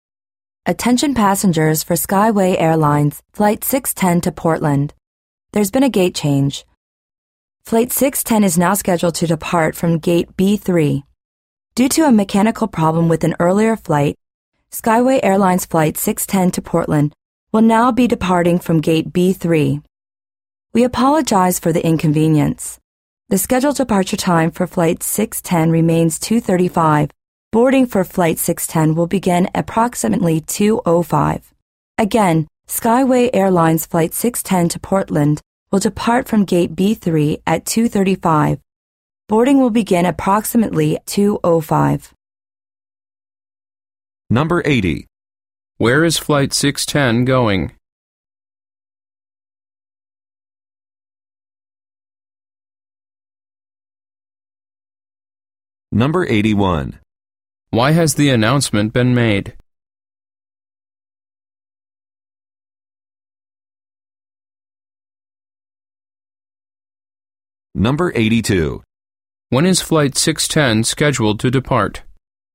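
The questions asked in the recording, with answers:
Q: Where is Flight 610 going?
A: Portland

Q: Why has the announcement been made?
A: There's been a gate change (due to a mechanical problem with an earlier flight).

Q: When is Flight 610 scheduled to depart?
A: 2:35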